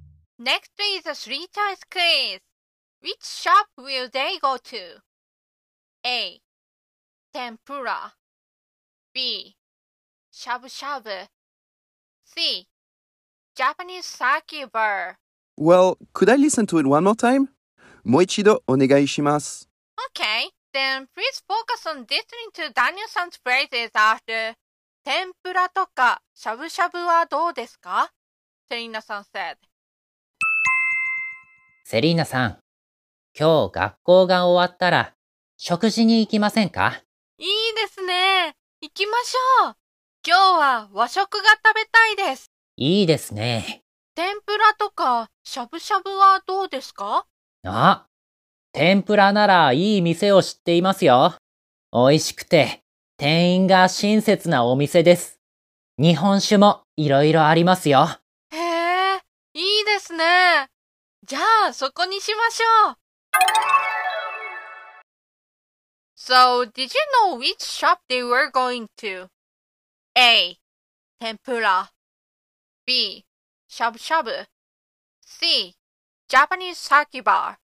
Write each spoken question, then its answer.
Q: Which shop will they go to?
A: Therefore, the answer is A.